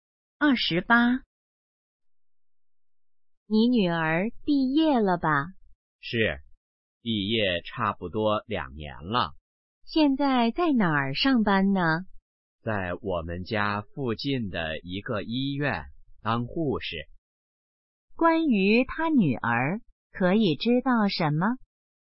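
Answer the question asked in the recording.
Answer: 在医院当护士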